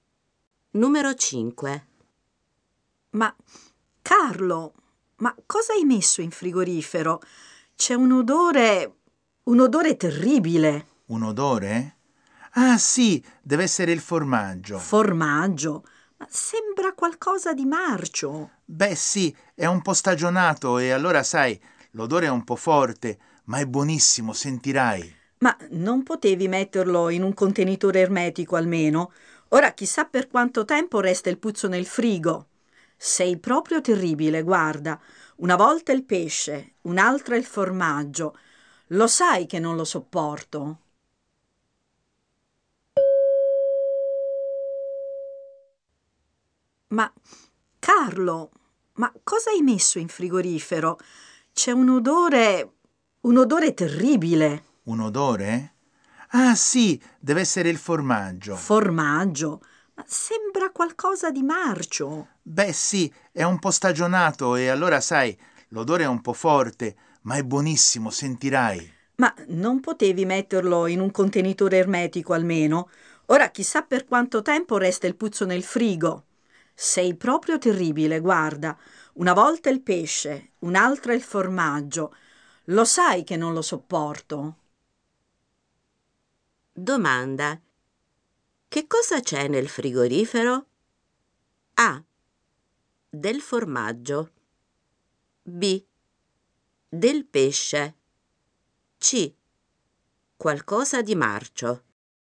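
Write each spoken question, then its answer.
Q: Domanda. Che cosa c'è nel frigorifero?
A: A: Del formaggio.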